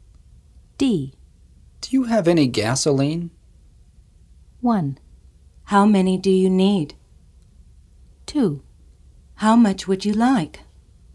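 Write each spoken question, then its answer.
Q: Do you have any gasoline?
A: 2: How much would you like?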